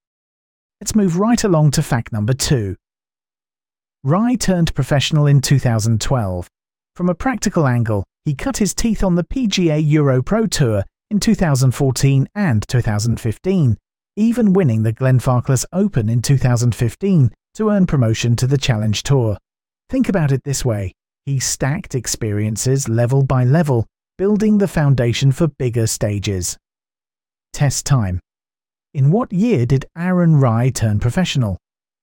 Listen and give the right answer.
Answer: 2012.